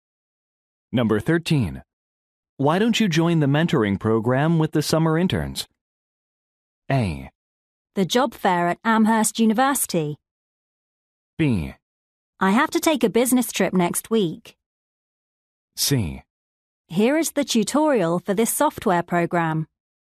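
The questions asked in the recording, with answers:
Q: Why don't you join the mentoring program with the summer interns?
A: B: I have to take a business trip next week.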